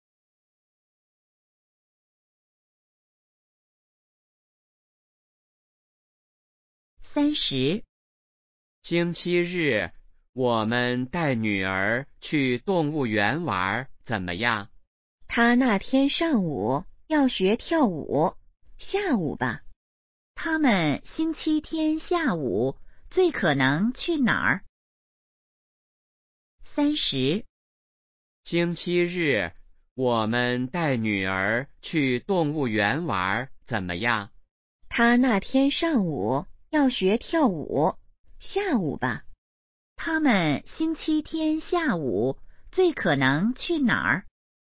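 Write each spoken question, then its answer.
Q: 他们星期天下午最可能去哪儿?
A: 动物园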